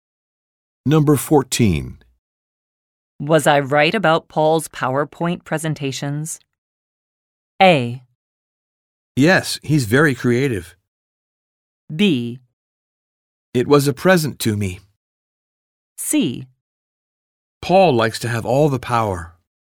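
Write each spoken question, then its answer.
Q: Was I right about Paul's PowerPoint presentations?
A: A: Yes, he's very creative.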